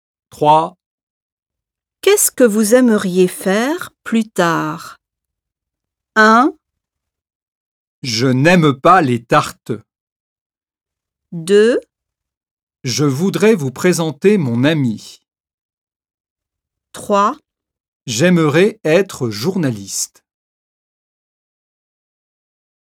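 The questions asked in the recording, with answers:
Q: Qu'est-ce que vous aimeriez faire plus tard?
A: 3: J'aimerais être journaliste.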